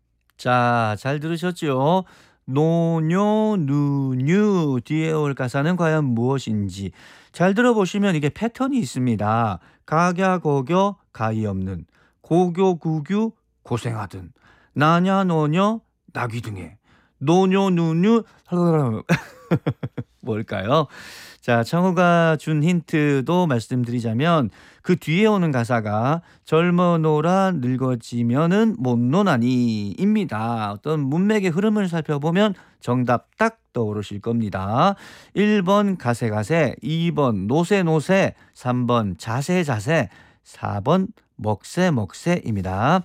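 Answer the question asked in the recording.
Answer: 2: 노세노세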